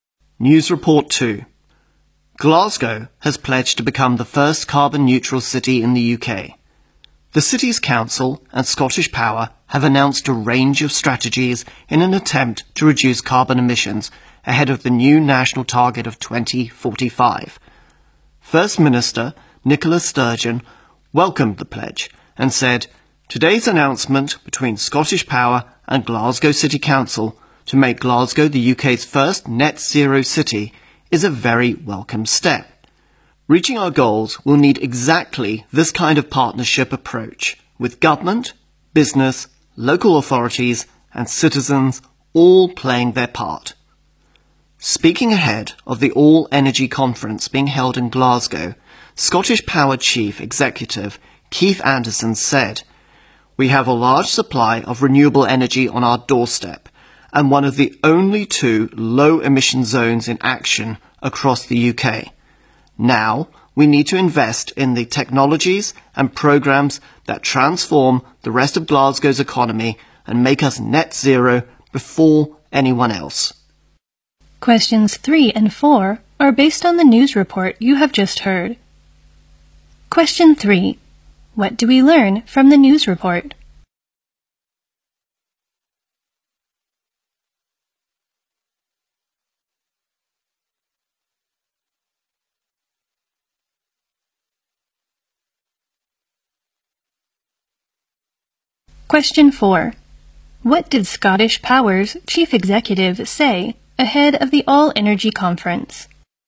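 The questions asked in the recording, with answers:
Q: What do we learn from the news report?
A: Glasgow pledged to become the UK's first carbon-neutral city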